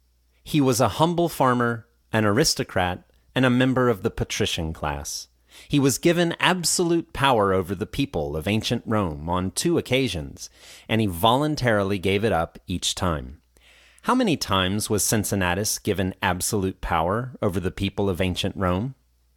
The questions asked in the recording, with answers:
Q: How many times was Cincinnatus given absolute power over the people of ancient Rome?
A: He was given absolute power over the people of ancient Rome on two occasions.